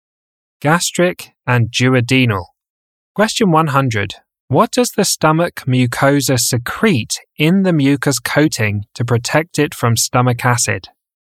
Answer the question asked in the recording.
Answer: Bicarbonate.